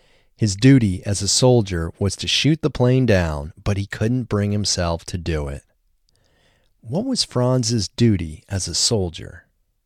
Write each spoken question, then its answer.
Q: What was Franz's duty as a soldier?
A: Franz's duty as a soldier was to shoot the plane down.